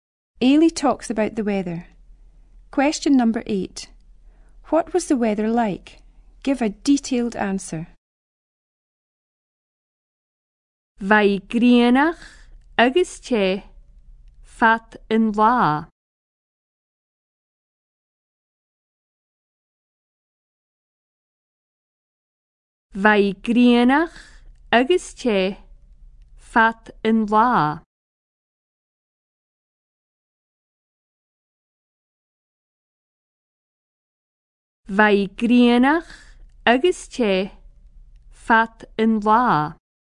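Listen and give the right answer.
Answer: Sunny and hot all day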